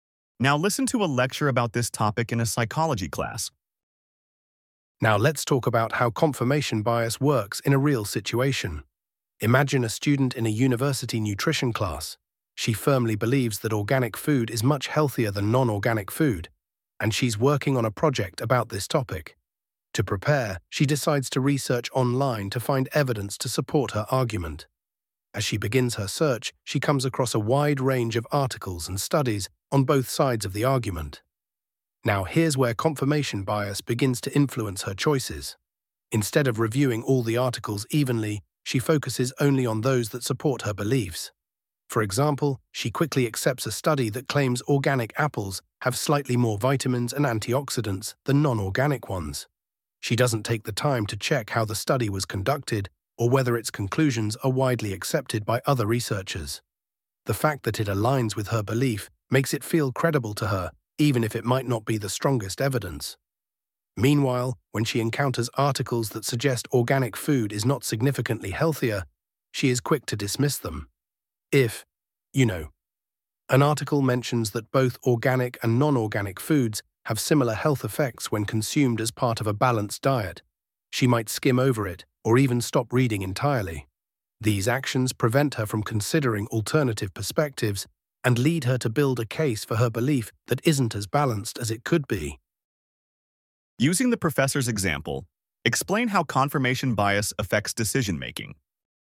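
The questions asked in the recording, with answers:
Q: Using the professor's example, explain how confirmation bias affects decision-making.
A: The student believes organic food is healthier. She quickly accepts a study that supports her view without checking it, and she dismisses or skims articles that disagree. Her case ends up one-sided instead of balanced.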